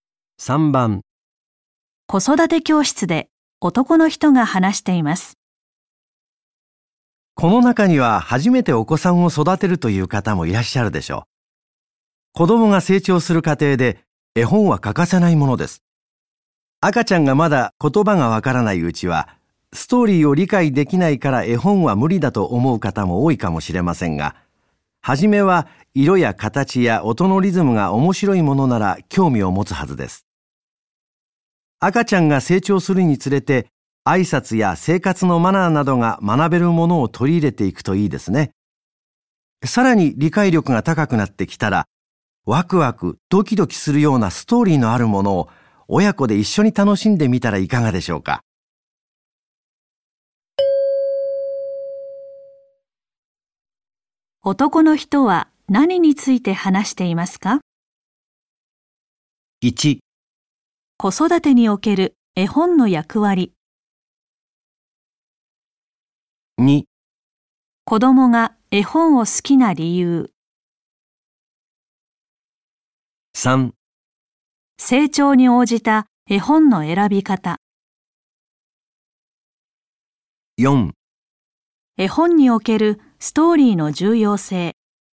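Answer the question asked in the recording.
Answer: 3: 成長に応じた絵本の選び方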